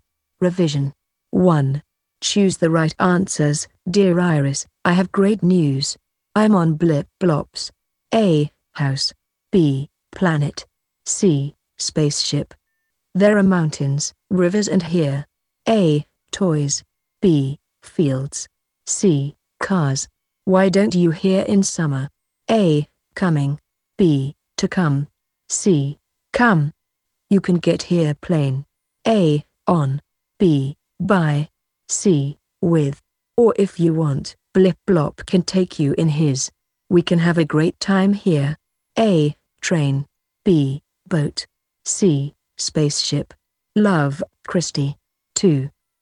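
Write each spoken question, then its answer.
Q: I'm on Blip Blops.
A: B: Planet

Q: There are mountains, rivers and here.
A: B: Fields

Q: Why don't you hear in summer?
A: C: Come

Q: You can get here plane.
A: B: By

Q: Or if you want, Blip Blop can take you in his.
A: C: Spaceship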